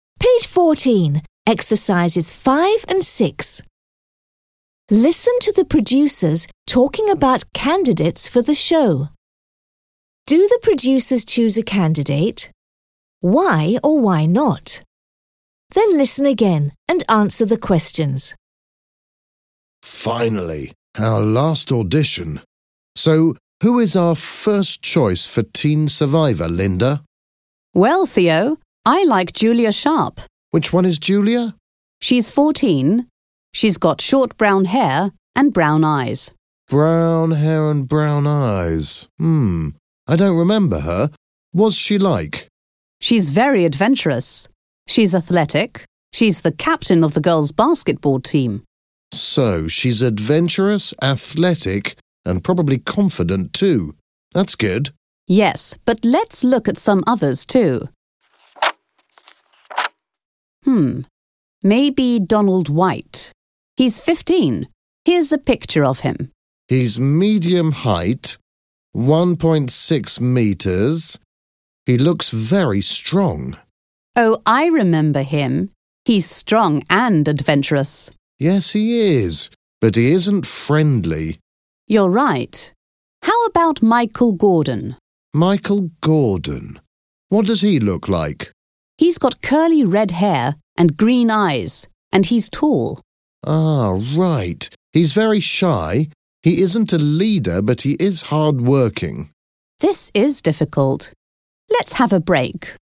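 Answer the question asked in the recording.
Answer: No, it's difficult to choose, so they take a break.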